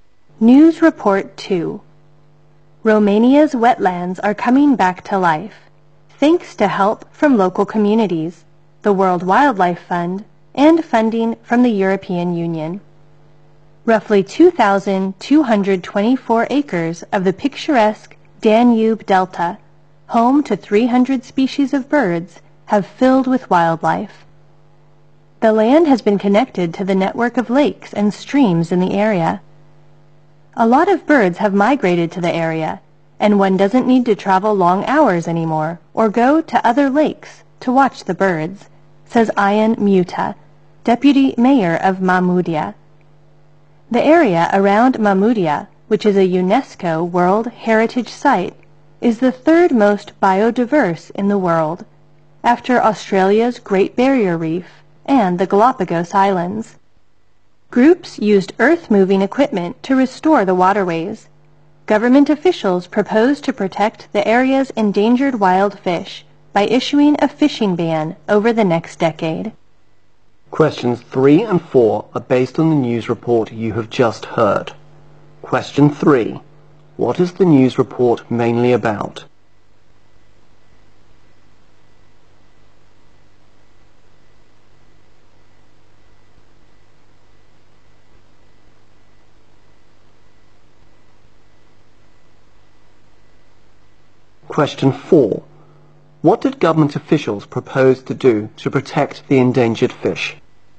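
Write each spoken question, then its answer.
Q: What is the news report mainly about?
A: The restoration of Romania's wetlands in the Danube Delta

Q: What did government officials propose to do to protect the endangered fish?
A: Issue a fishing ban over the next decade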